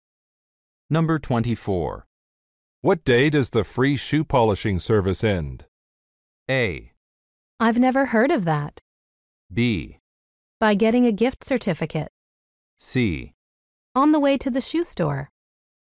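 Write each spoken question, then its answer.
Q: What day does the free shoe polishing service end?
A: A: I've never heard of that.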